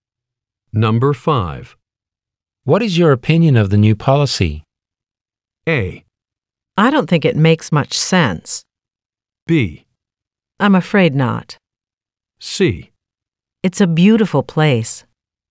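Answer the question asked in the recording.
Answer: A: I don't think it makes much sense.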